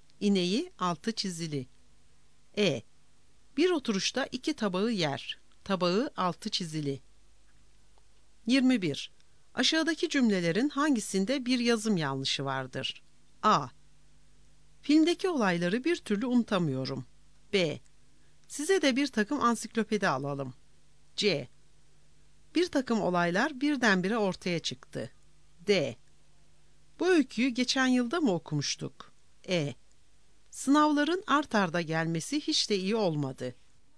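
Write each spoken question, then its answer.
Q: Aşağıdaki cümlelerin hangisinde bir yazım yanlışı vardır?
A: C: Bir takım olaylar birdenbire ortaya çıktı.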